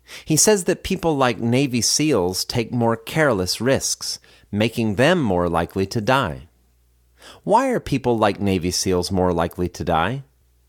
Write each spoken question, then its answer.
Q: Why are people like Navy SEALs more likely to die?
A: People like Navy SEALs are more likely to die because they take more risks.